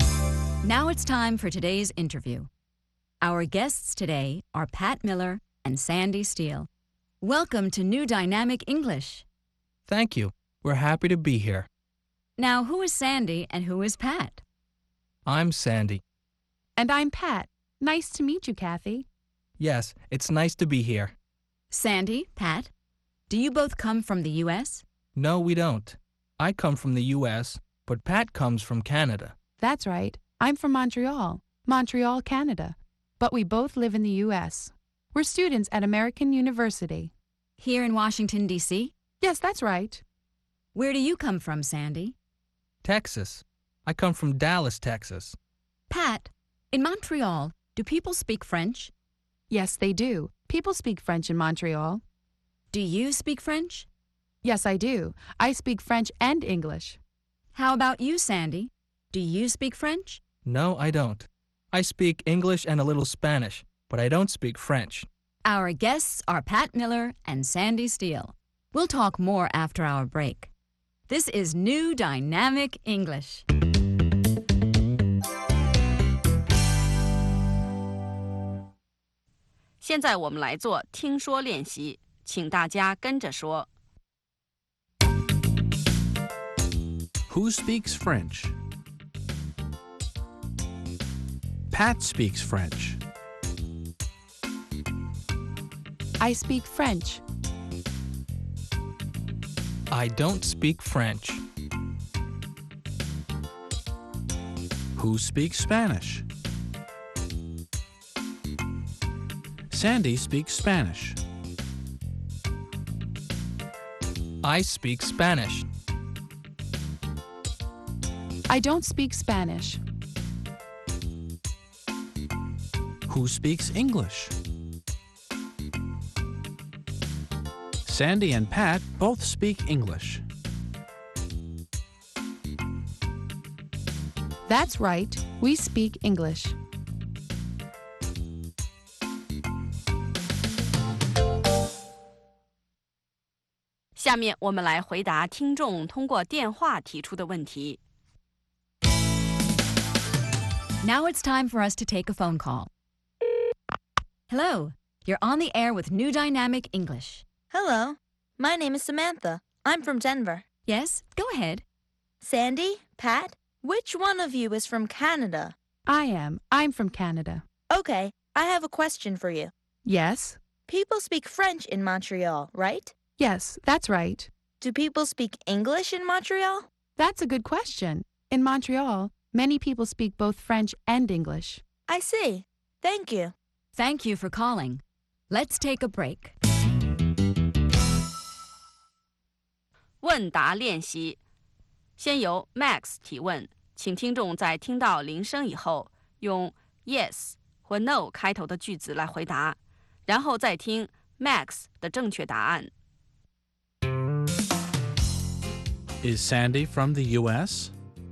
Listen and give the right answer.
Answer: Yes, he is. He's from the U.S.